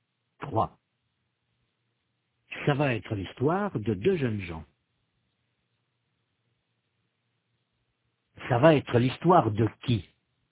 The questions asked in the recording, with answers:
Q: Ça va être l'histoire de qui?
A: Ça va être l'histoire de deux jeunes gens.